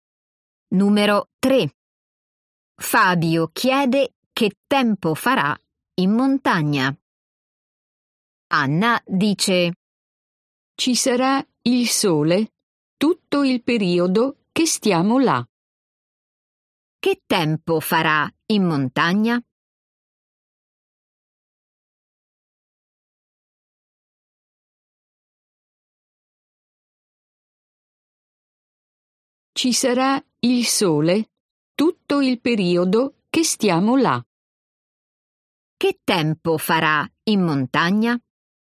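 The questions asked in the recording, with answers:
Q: Che tempo farà in montagna?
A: Ci sarà il sole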